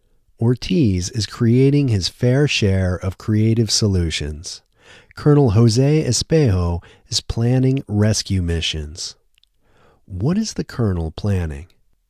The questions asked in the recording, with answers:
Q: What is the colonel planning?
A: The colonel is planning rescue missions.